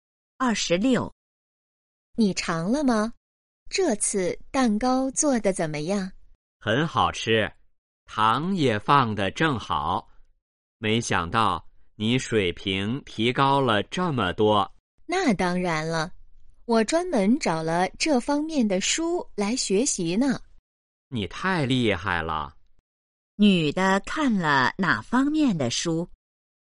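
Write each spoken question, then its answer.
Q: 女的看了哪方面的书?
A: 做蛋糕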